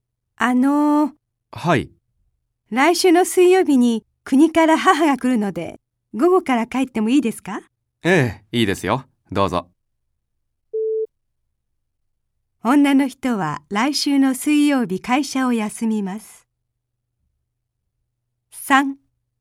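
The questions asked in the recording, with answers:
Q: 女の人は来週の水曜日会社を休みます。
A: ×(午後から帰るだけ)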